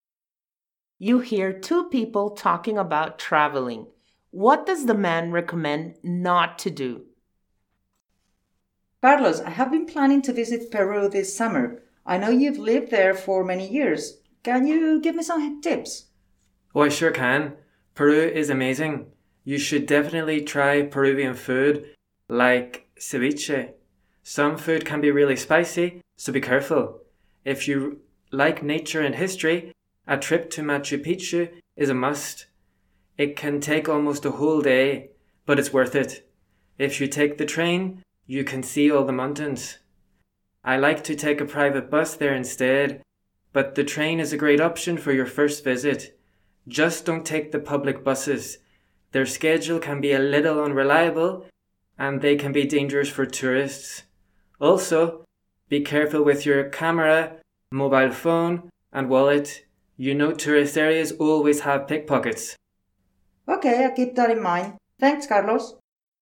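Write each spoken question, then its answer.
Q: What does the man recommend not to do?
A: Take the public buses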